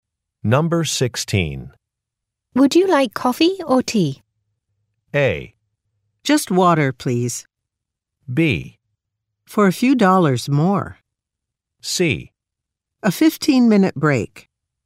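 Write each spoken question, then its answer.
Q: Would you like coffee or tea?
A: A: Just water, please.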